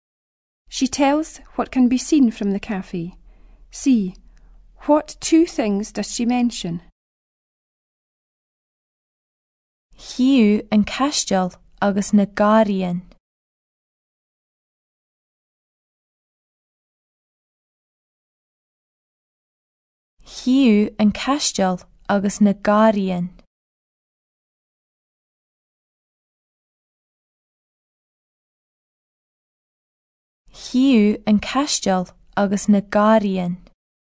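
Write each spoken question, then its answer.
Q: What two things does she mention?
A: The castle and the gardens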